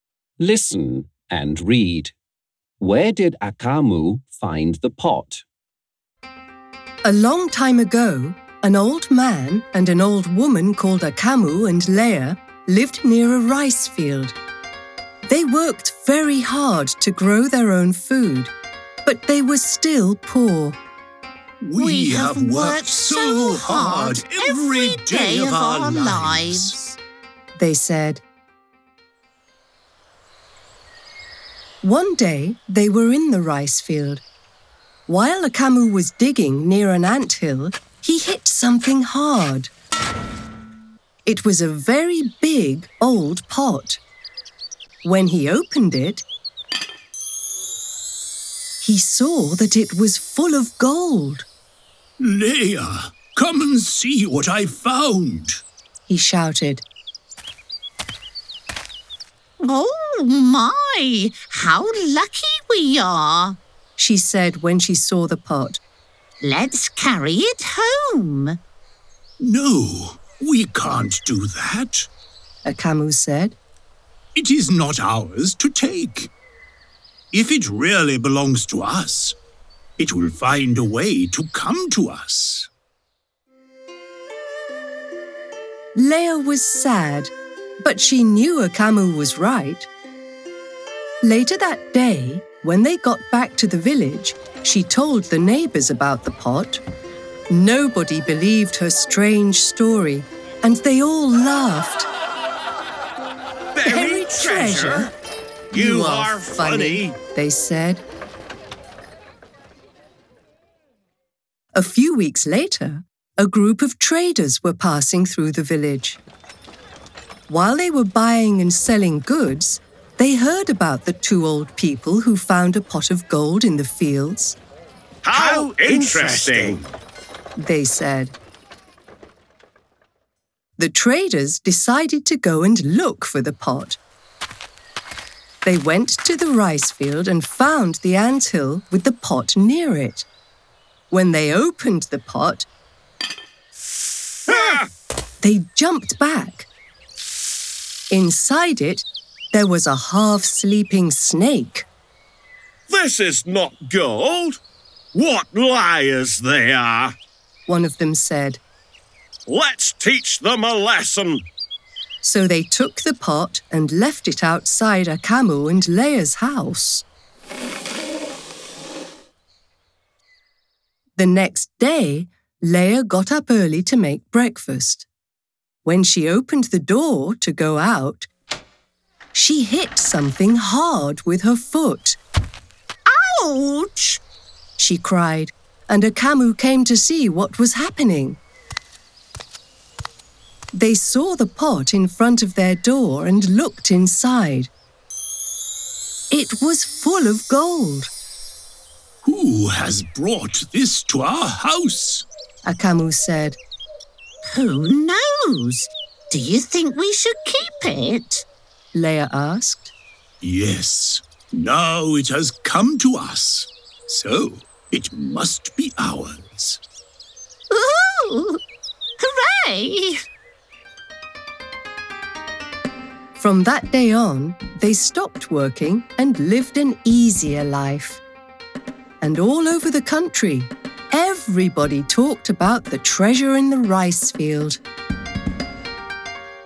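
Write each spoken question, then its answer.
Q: Where did Akamu find the pot?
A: In the rice field, near an anthill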